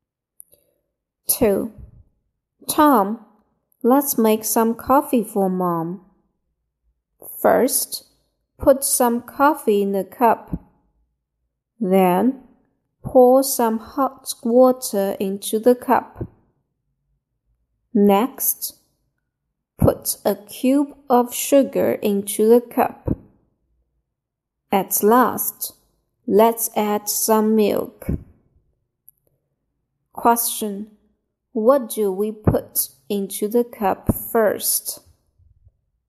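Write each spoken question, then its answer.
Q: What do we put into the cup first?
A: Some coffee.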